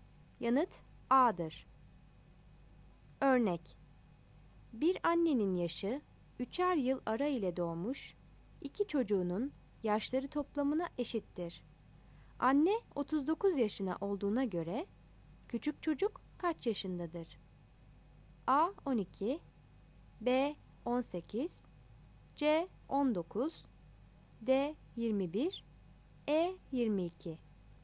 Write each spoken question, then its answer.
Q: Anne 39 yaşına olduğuna göre, küçük çocuk kaç yaşındadır?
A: Yanıt B'dir.